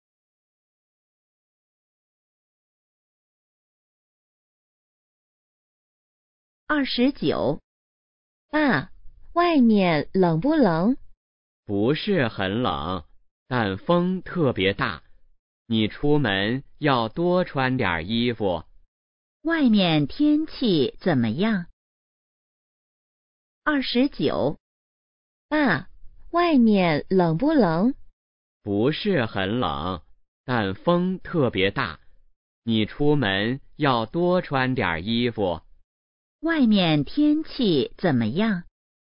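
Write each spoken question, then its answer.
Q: 外面天气怎么样?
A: 不是很冷,但风特别大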